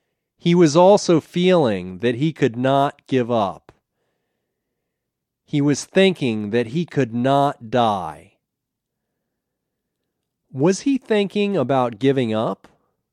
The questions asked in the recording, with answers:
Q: Was he thinking about giving up?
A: No, he wasn't thinking about giving up.